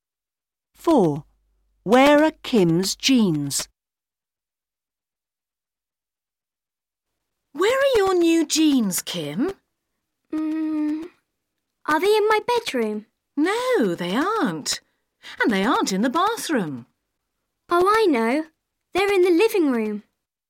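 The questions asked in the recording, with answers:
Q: Where are Kim's jeans?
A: in the living room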